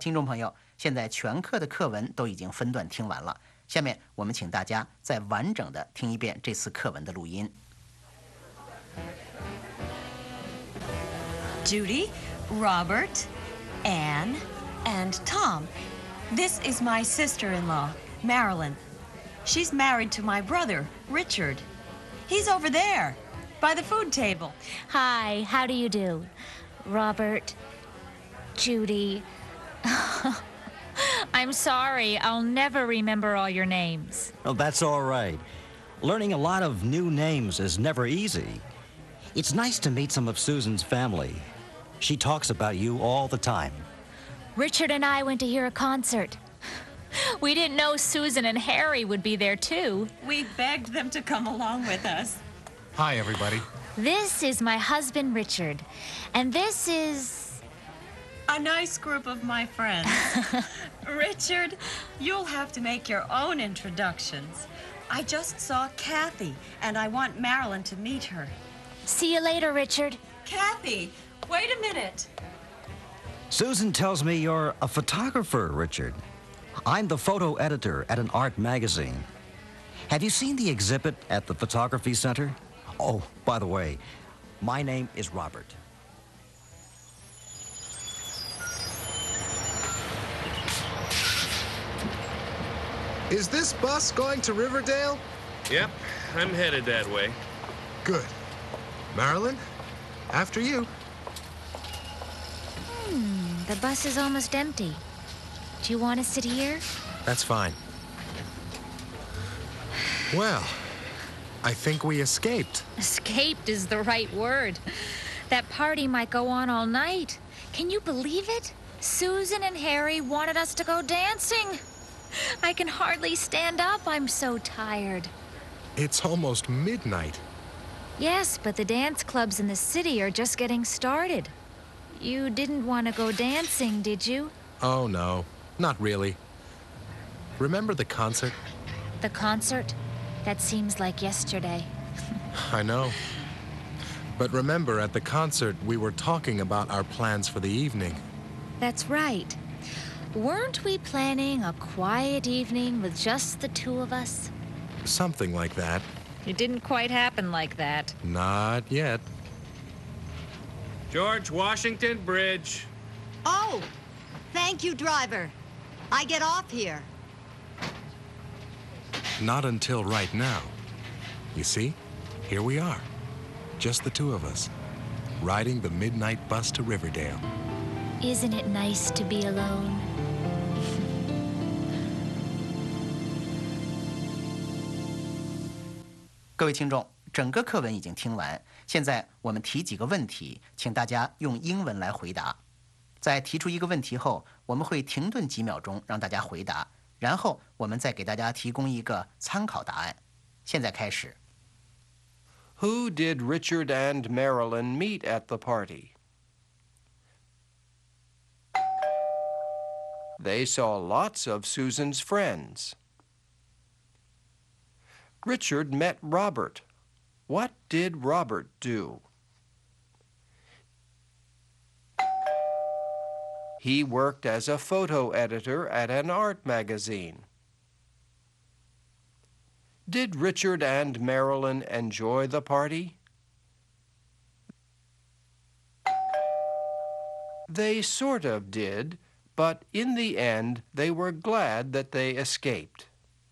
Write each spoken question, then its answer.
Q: Who did Richard and Marilyn meet at the party?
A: They saw lots of Susan's friends.

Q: What did Robert do?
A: He worked as a photo editor at an art magazine.